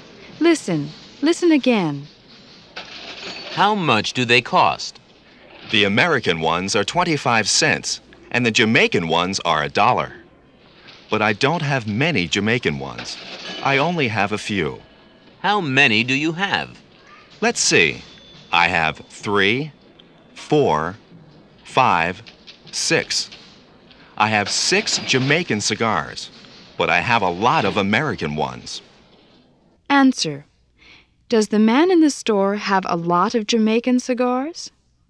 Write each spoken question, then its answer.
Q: Answer. Does the man in the store have a lot of Jamaican cigars?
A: No, he doesn't.